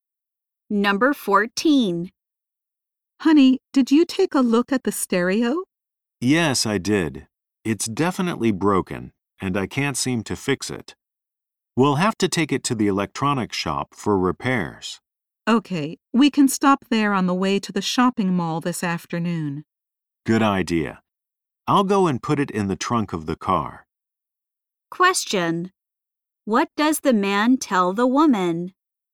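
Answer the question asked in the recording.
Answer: The stereo is broken and must be taken to the shop for repairs.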